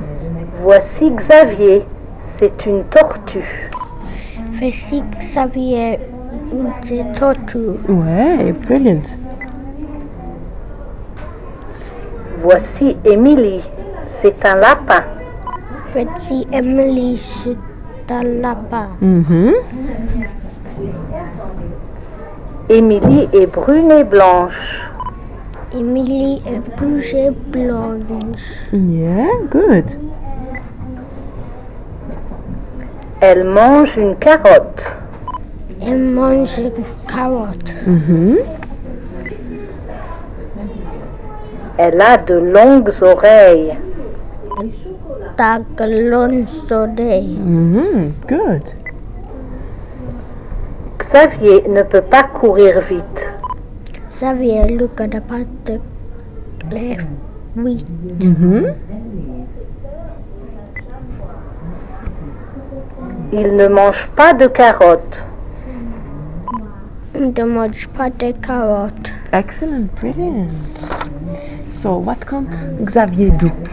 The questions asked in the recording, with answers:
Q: So, what can't Xavier do?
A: Run.